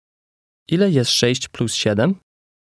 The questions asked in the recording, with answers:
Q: Ile jest 6 plus 7?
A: 13.